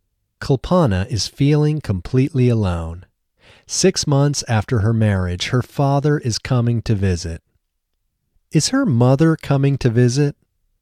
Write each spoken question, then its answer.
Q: Is her mother coming to visit?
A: No, her mother isn't coming to visit.